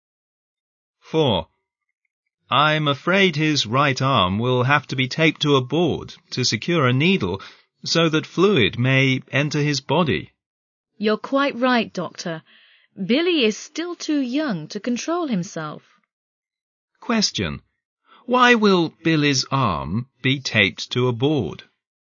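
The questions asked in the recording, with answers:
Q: Why will Billy's arm be taped to a board?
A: To hold a needle in place so that fluid can enter his body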